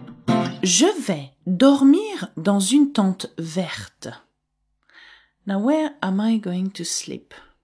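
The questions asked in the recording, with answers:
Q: Now where am I going to sleep?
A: In a green tent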